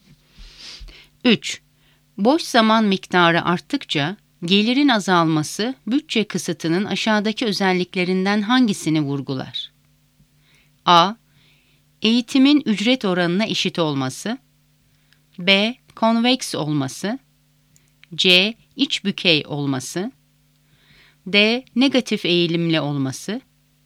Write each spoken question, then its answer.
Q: Boş zaman miktarı arttıkça gelirin azalması bütçe kısıtının aşağıdaki özelliklerinden hangisini vurgular?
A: Doğru cevap D.